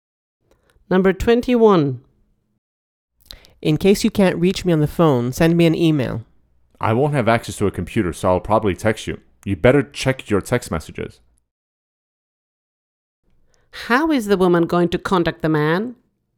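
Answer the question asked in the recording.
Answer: by text message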